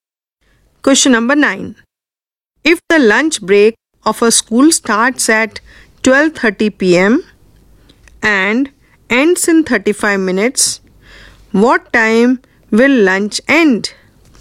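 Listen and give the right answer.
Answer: 1:05 p.m.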